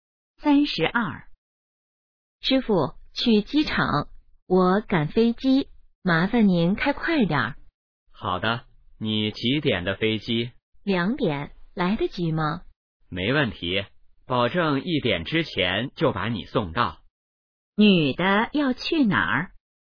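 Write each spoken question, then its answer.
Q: 女的要去哪儿?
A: 机场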